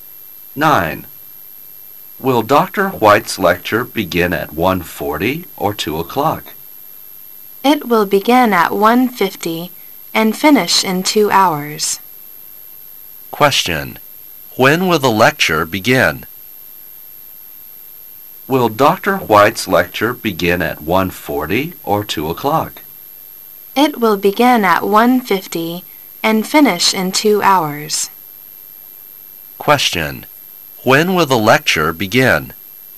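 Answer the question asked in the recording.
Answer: At 1:50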